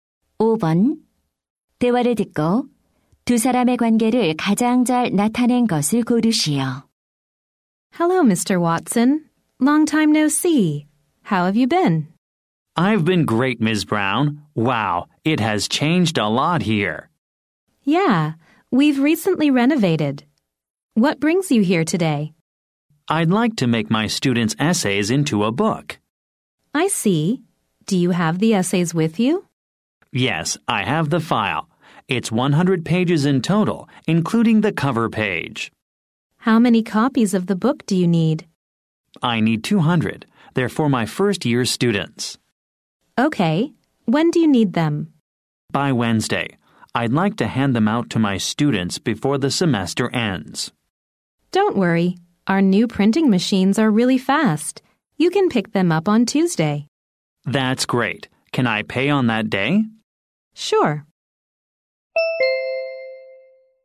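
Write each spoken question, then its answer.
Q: 대화를 듣고 두 사람의 관계를 가장 잘 나타낸 것을 고르시오.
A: 교사 - 인쇄소 직원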